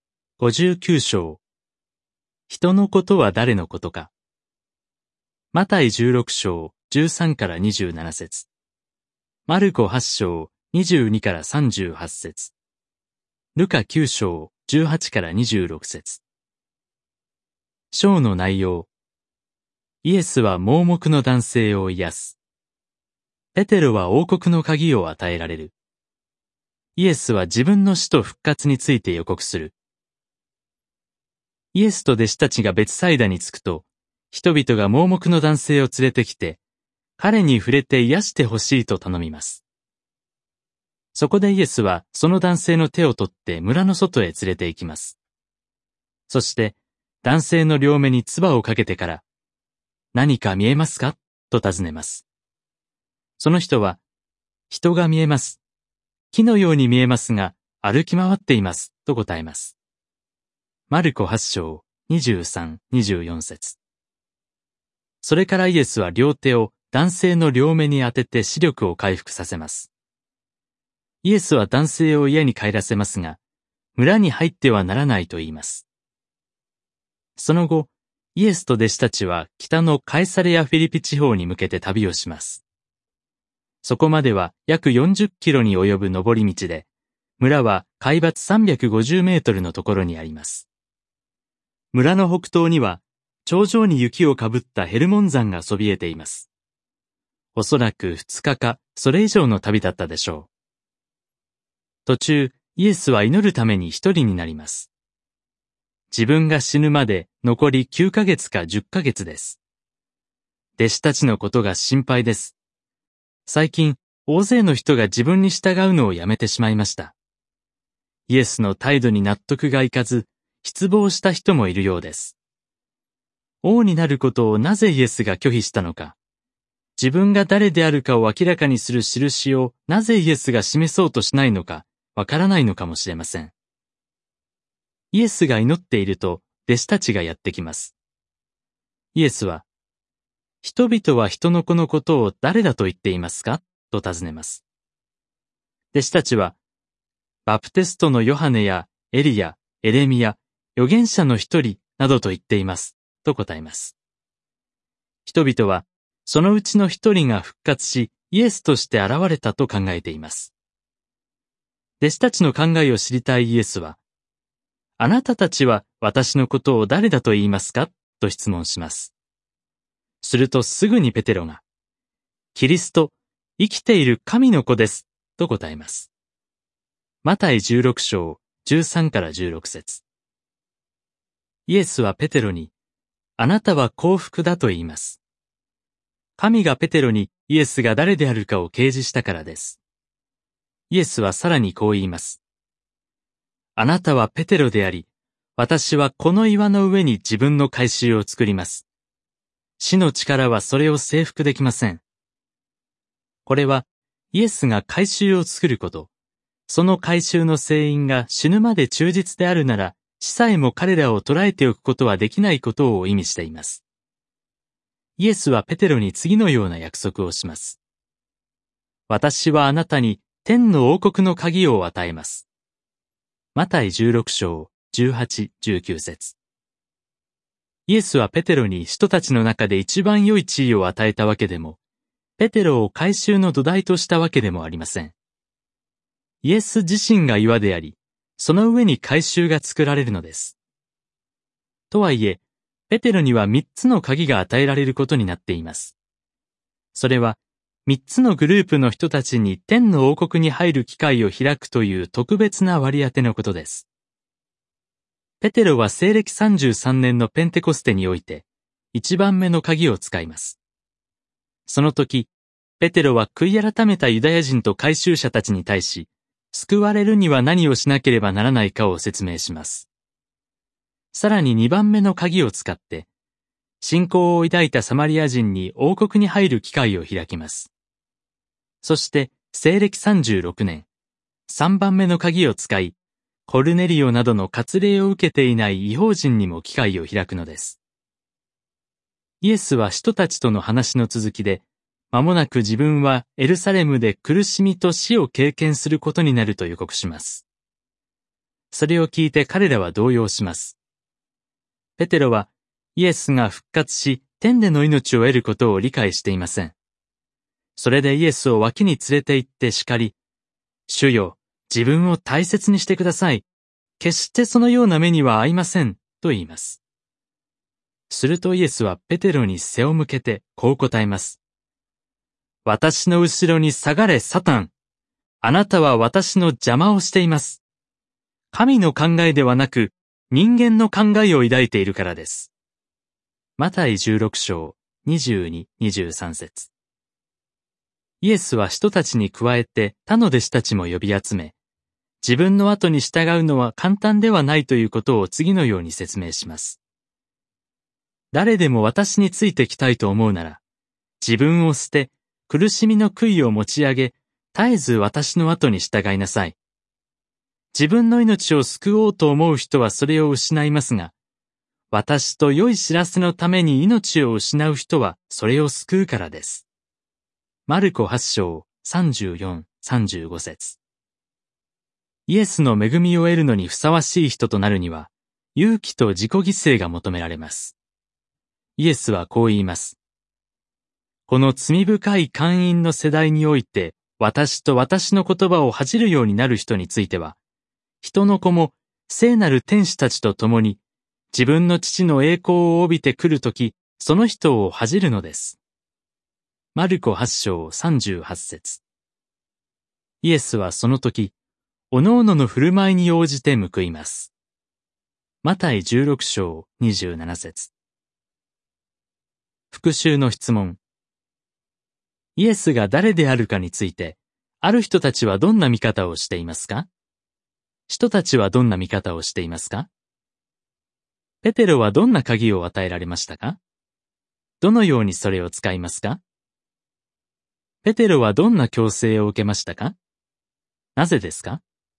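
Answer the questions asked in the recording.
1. バプテストのヨハネやエリア、エレミア、預言者の一人が復活した者だと考えている
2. キリスト、生きている神の子
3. 天の王国の三つの鍵(三つのグループに王国に入る機会を開く割り当て)
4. ペンテコステでユダヤ人と改宗者に、次にサマリア人に、西暦36年に割礼を受けていない異邦人に機会を開く
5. 「私の後ろに下がれ、サタン」と正された。神の考えではなく人間の考えを抱いていたから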